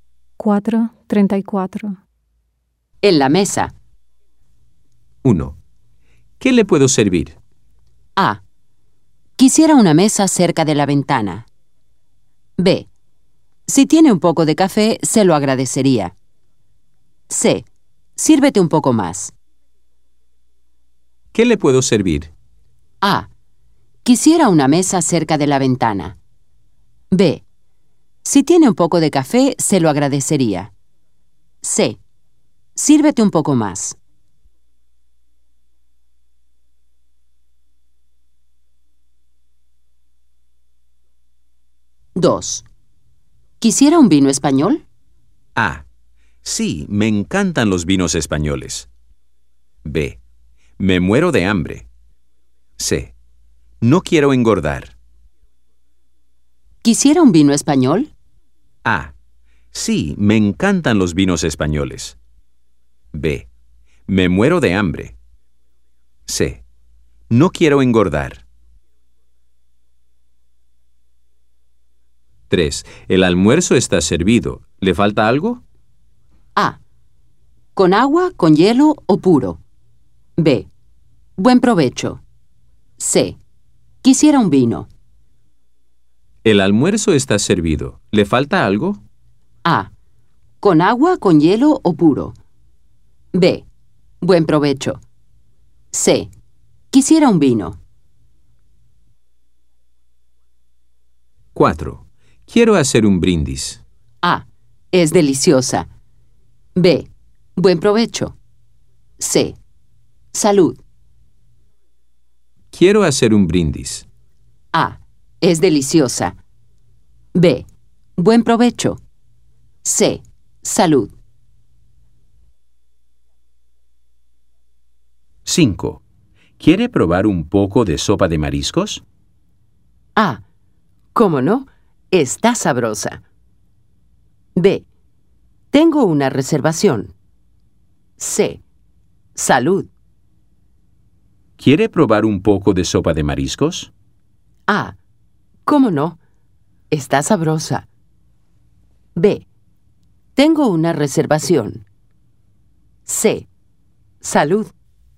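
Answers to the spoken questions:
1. B: Si tiene un poco de café, se lo agradecería.
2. A: Sí, me encantan los vinos españoles.
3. C: Quisiera un vino.
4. C: Salud.
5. A: ¿Cómo no? Está sabrosa.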